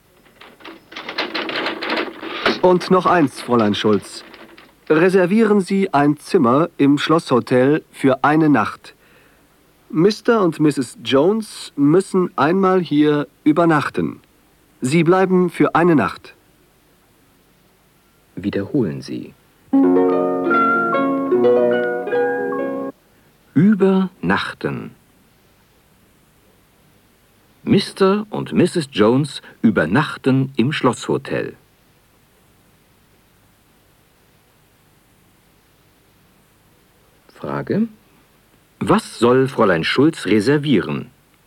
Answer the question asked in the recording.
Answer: Sie soll ein Zimmer im Schlosshotel reservieren.